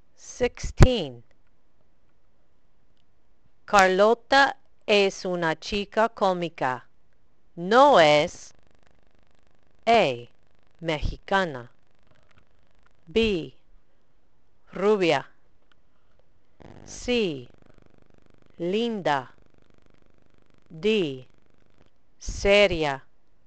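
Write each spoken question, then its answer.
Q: Carlota es una chica cómica. No es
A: D: seria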